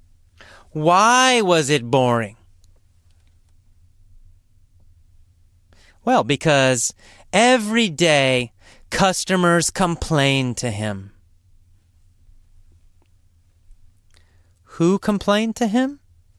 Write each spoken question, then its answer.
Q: Who complained to him?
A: Customers. Customers complained to him every day.